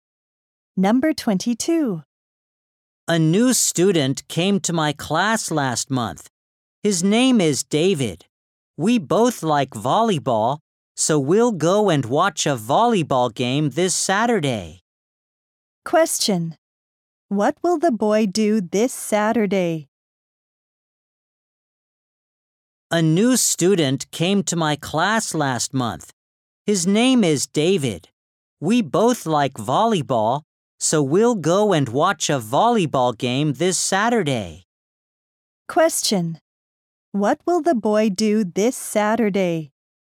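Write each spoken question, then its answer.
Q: What will the boy do this Saturday?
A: Watch a volleyball game with David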